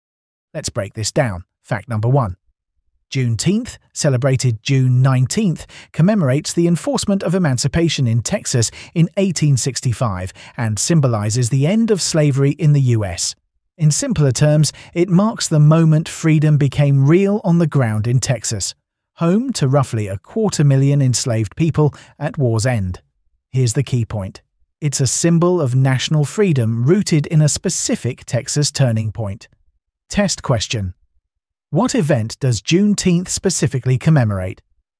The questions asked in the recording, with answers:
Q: What event does Juneteenth specifically commemorate?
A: the enforcement of emancipation in Texas.